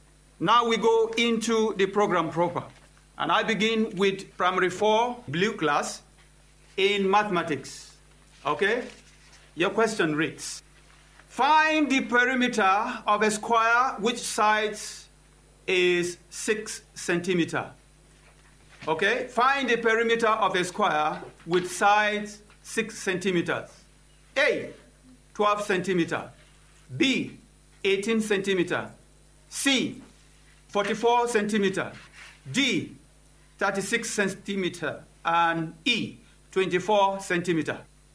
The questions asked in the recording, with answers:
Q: find the perimeter of a square which sides is 6 centimeters.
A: Yes, it's 24 centimeters.